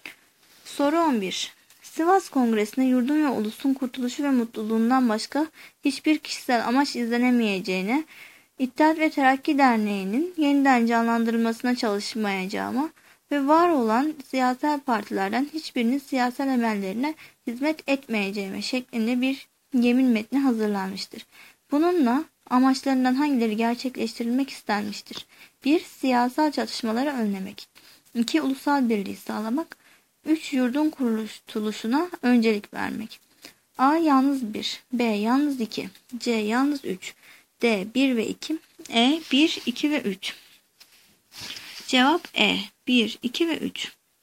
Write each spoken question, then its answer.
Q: Bununla amaçlarından hangileri gerçekleştirilmek istenmiştir?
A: Cevap E. 1, 2 ve 3.